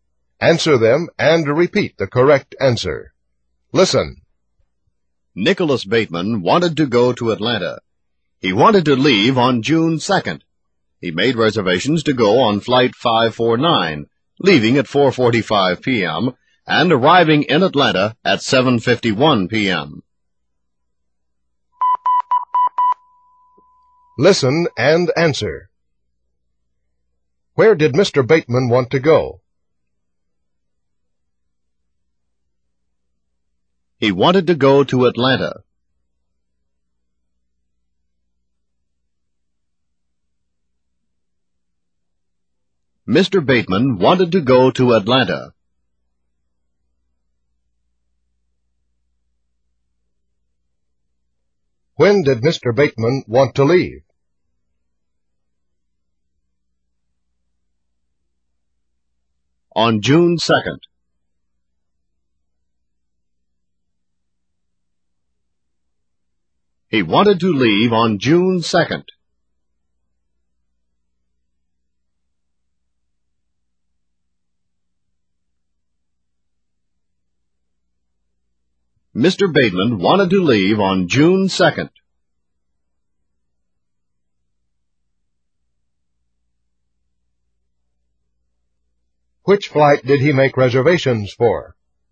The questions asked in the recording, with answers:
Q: Where did Mr.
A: He wanted to go to Atlanta.

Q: When did Mr. Bateman want to leave?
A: On June 2nd.

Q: Which flight did he make reservations for?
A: Flight 549.